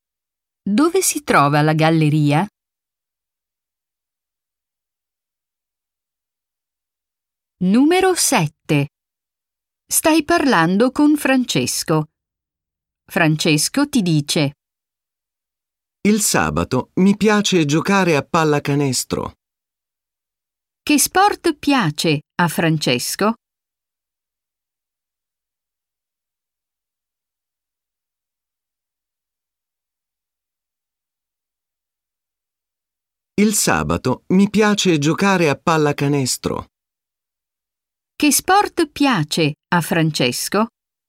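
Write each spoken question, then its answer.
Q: Che sport piace a Francesco?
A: La pallacanestro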